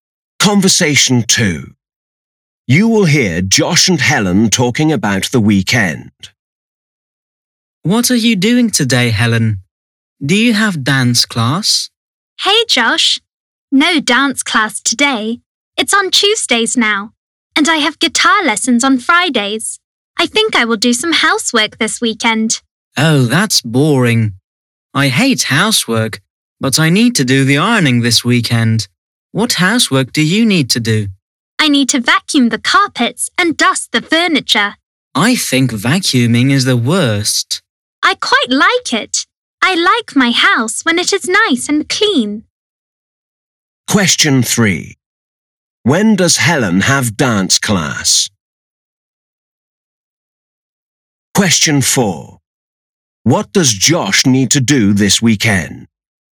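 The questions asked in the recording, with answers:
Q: When does Helen have dance class?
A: On Tuesdays

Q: What does Josh need to do this weekend?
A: The ironing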